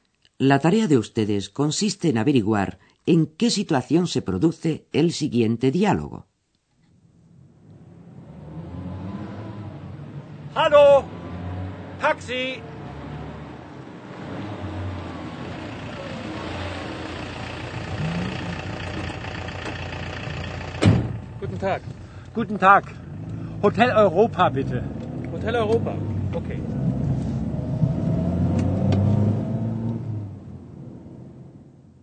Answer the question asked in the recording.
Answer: Una persona se encuentra caminando por la calle y detiene un taxi.